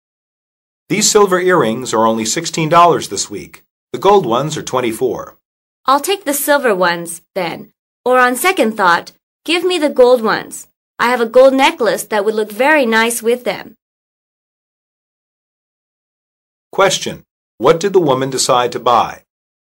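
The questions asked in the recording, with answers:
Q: What did the woman decide to buy?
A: The gold earrings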